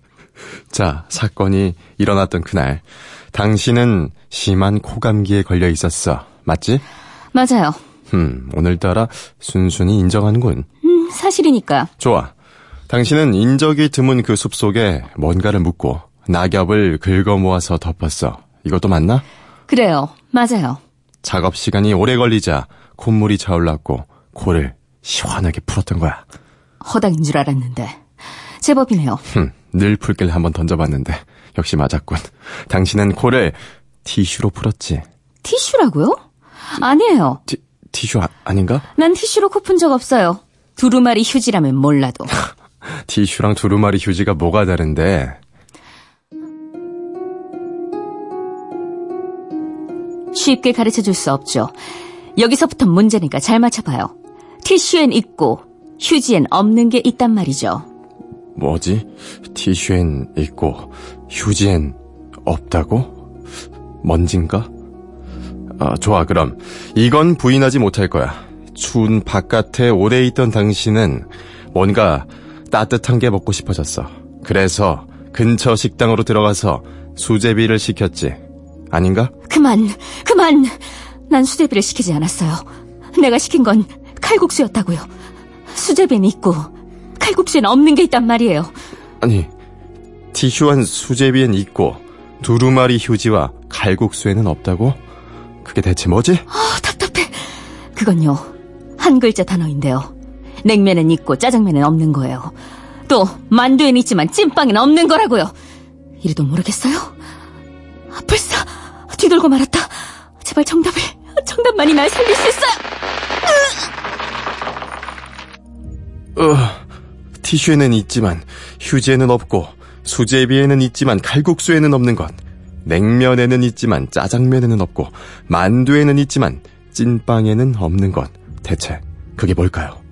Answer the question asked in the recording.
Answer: 정답은 물이었습니다.